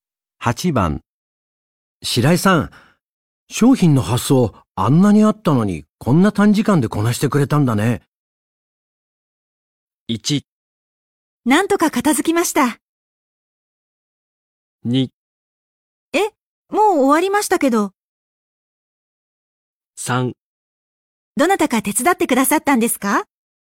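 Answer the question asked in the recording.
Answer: 1: なんとか片付きました。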